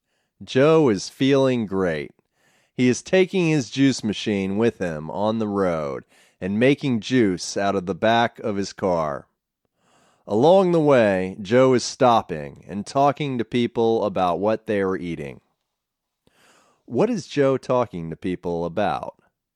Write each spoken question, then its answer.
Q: What is Joe talking to people about?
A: Joe is talking to people about what they are eating.